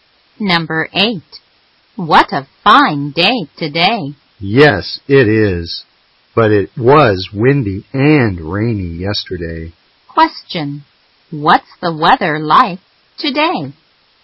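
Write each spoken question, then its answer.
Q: Question. What's the weather like today?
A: Fine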